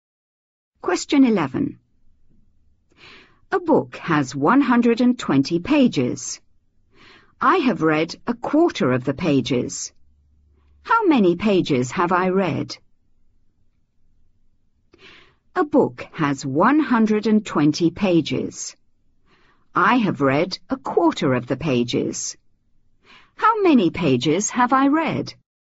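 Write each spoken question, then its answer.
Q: How many pages have I read?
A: 30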